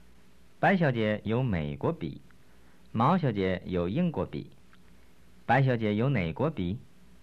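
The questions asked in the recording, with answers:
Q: 白小姐有哪国笔?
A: 美国笔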